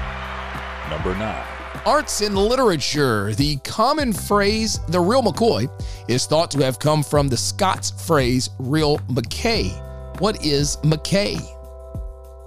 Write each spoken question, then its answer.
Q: What is McKay?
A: It's going to be whiskey.